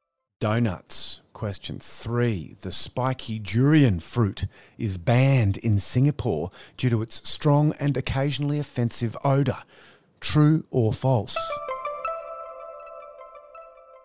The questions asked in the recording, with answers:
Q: The spiky durian fruit is banned in Singapore due to its strong and occasionally offensive odour. True or false?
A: It's false. They do stink, but they haven't been banned.